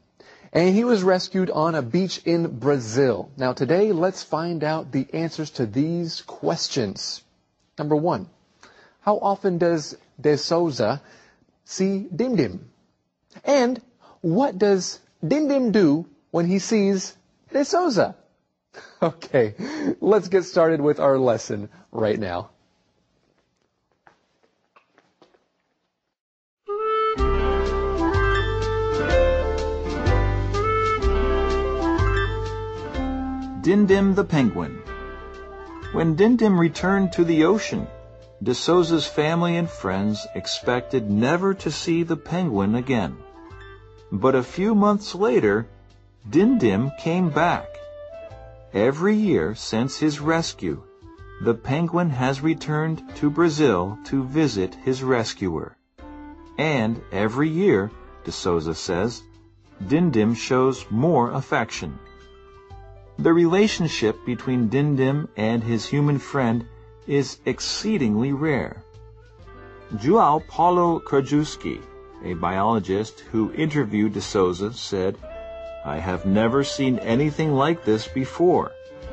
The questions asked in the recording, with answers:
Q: Number one, how often does De Souza see Dindim?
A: Every year since the penguin has come back.